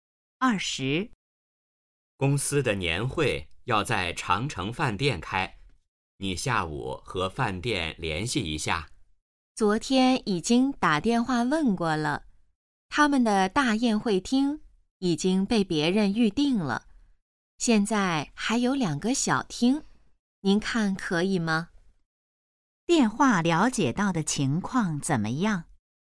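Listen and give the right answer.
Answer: 大宴会厅已被预订,只剩两个小厅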